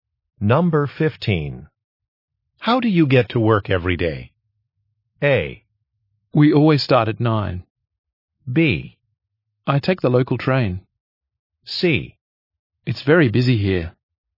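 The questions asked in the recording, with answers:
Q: How do you get to work every day?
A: B: I take the local train.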